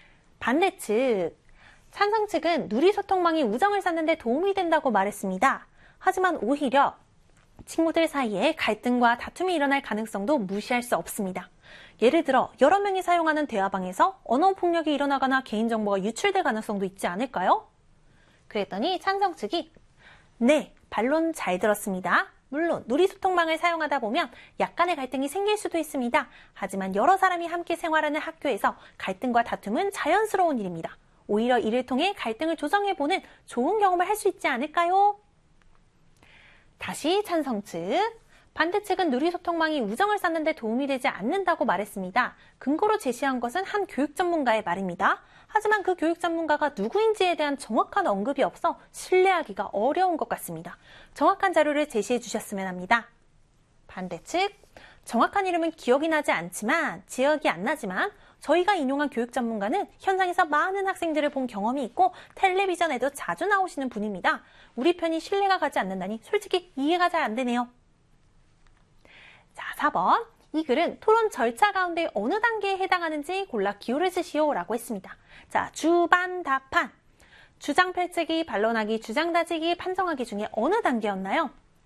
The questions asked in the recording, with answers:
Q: 이 글은 토론 절차 가운데 어느 단계에 해당하는지 골라 기호를 쓰시오 라고 했습니다.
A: 바로 반론하기 단계가 되겠습니다.